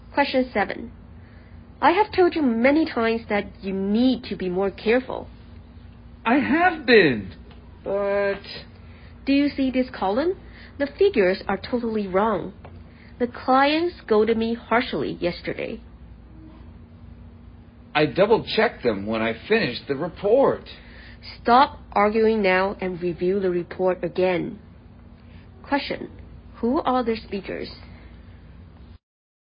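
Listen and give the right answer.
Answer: A boss (manager) and an employee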